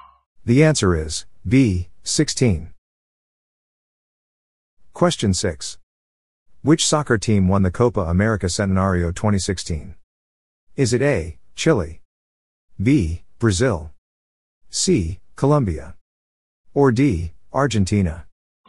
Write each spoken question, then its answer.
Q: Which soccer team won the Copa America Centenario 2016?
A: The answer is A, Chile.